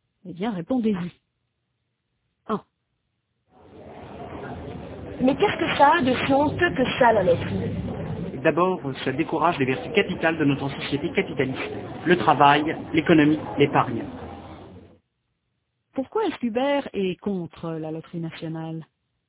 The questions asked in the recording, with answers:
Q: Pourquoi est-ce qu'Hubert est contre la loterie nationale ?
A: Parce qu'il pense que ça décourage les vertus capitales de notre société capitaliste.